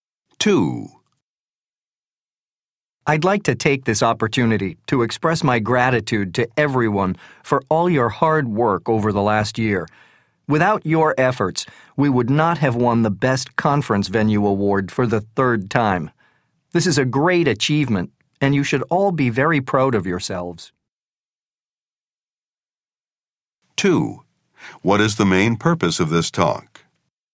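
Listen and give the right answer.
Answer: To thank the staff for their hard work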